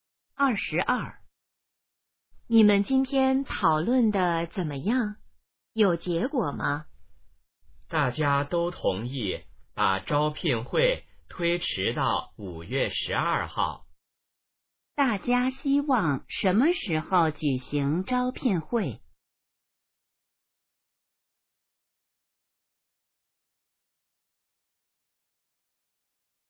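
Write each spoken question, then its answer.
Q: 大家希望什么时候举行招聘会?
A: 5月12号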